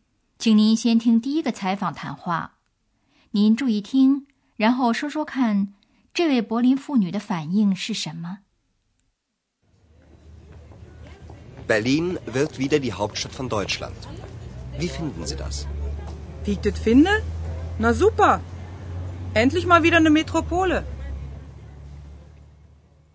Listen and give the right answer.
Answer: 这位柏林妇女用地道的柏林方言来表达他兴奋的心情,他觉得柏林又成为首都真是太好了。